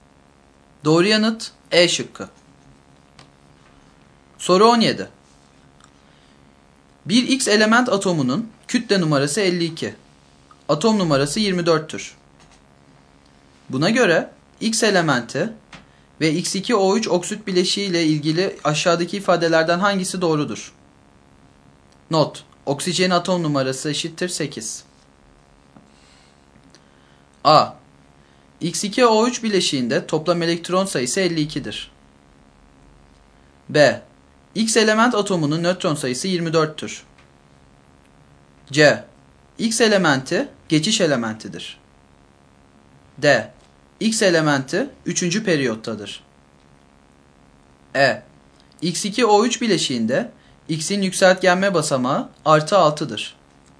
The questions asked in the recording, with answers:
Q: Buna göre X elementi ve X2O3 oksit bileşiği ile ilgili aşağıdaki ifadelerden hangisi doğrudur?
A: Doğru yanıt C şıkkı.